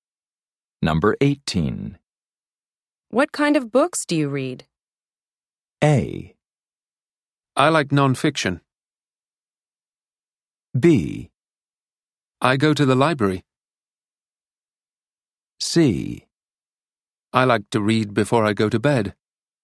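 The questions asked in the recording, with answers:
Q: What kind of books do you read?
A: A: I like nonfiction.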